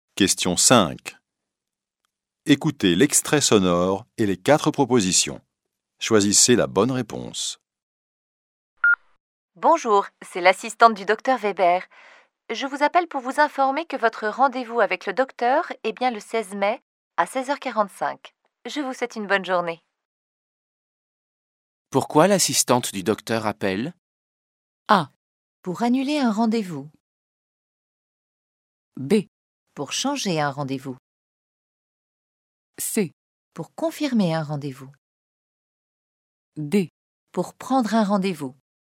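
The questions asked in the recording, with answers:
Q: Pourquoi l'assistante du docteur appelle ?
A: C: Pour confirmer un rendez-vous.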